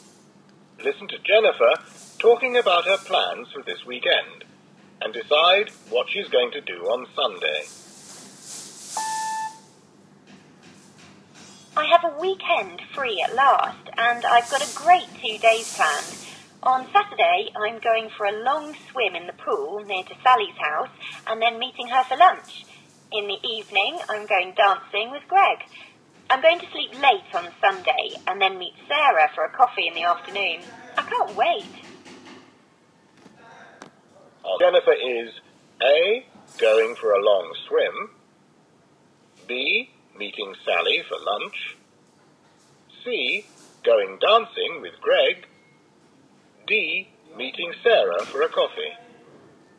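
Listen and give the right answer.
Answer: D: meeting Sarah for a coffee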